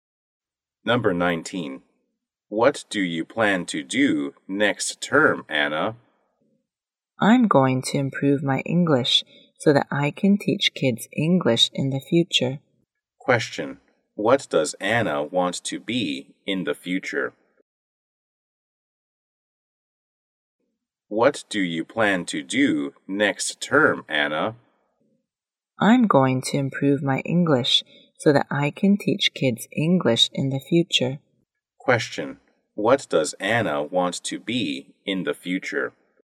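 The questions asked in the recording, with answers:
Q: What does Anna want to be in the future?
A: An English teacher.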